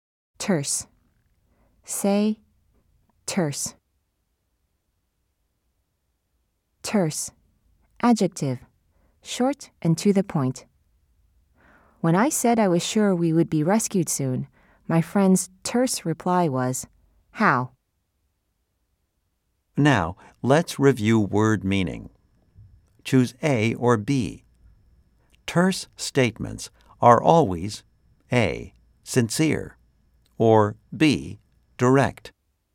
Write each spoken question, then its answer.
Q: Choose A or B. Terse statements are always A, sincere, or B, direct.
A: If you said B, you are correct.